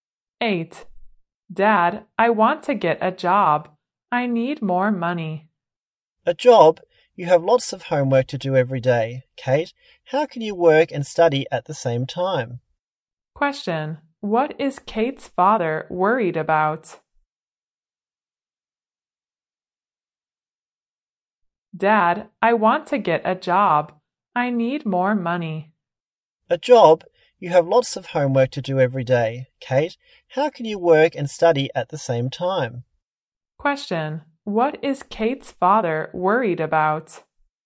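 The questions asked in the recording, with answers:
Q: What is Kate's father worried about?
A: That a job would affect her study; she can't work and study at the same time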